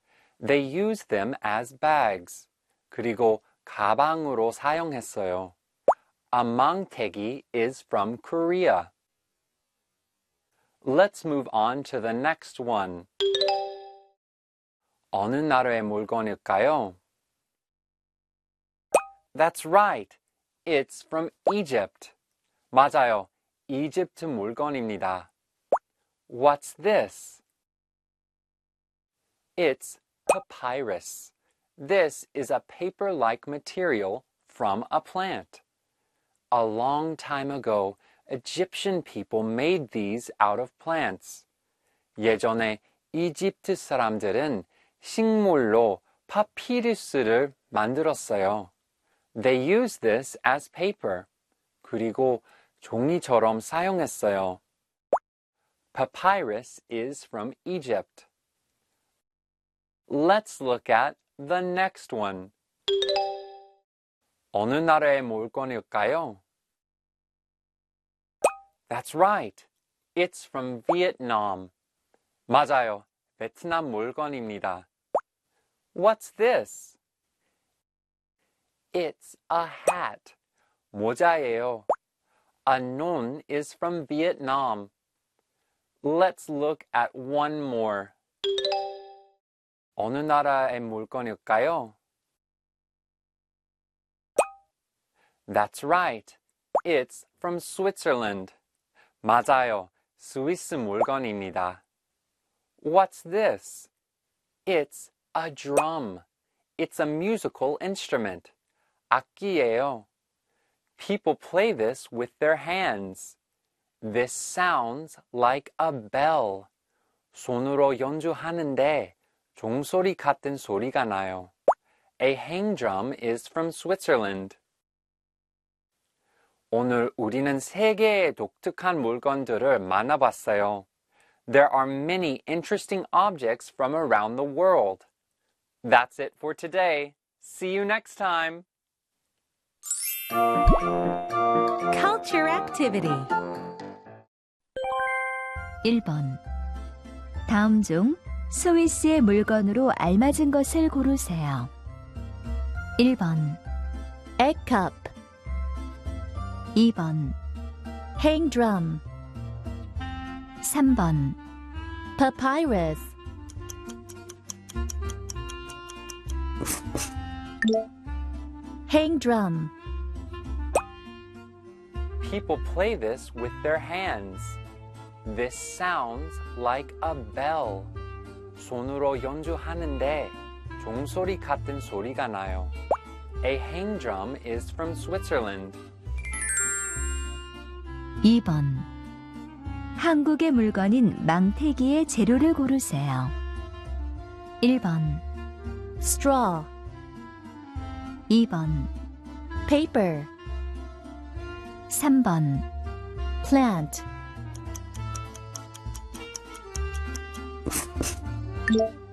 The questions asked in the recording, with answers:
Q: 다음 중 스위스의 물건으로 알맞은 것을 고르세요.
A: 행드럼.